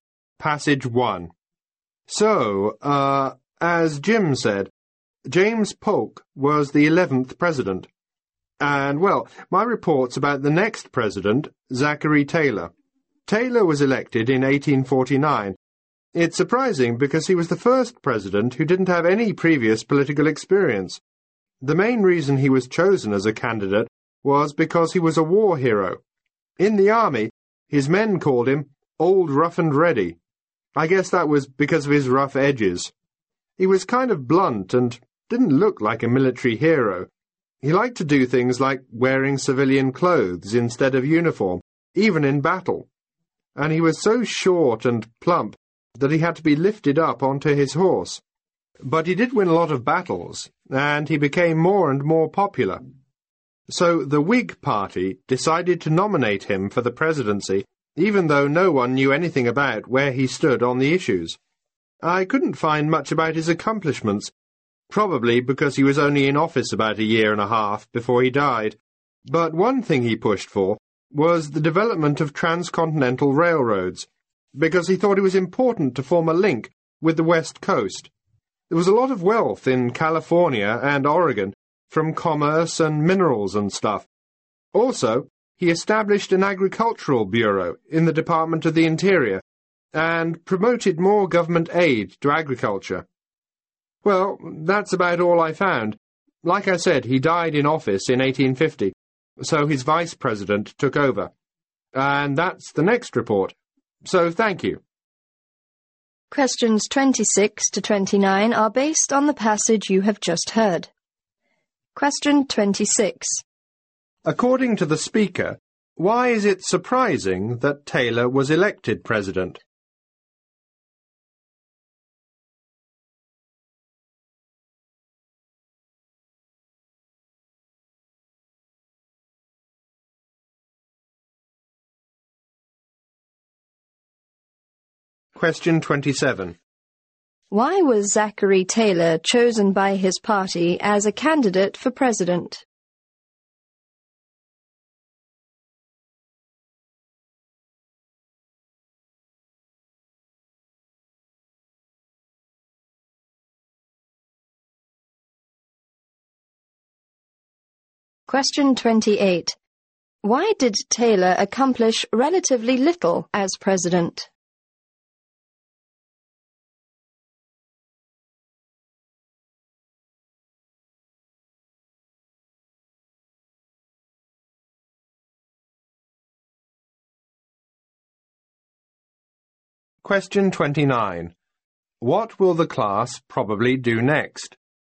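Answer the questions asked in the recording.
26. He had no previous political experience
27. He was a war hero
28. He died after only about a year and a half in office
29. Hear a report on the next president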